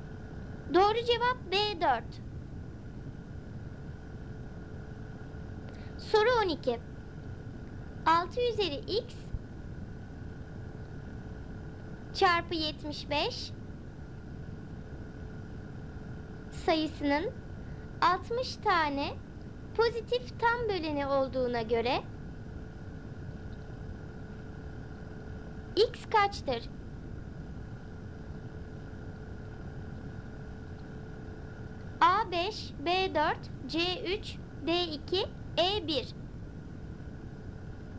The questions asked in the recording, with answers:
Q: x kaçtır?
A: Doğru cevap C3.